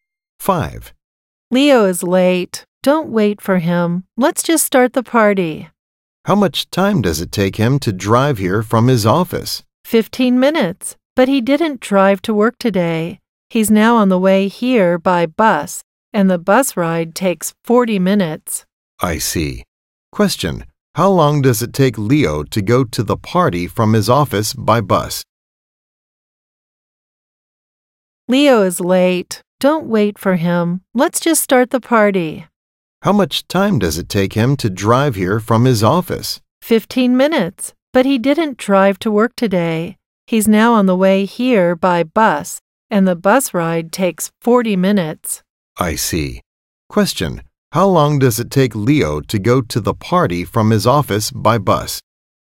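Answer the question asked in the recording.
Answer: 40 minutes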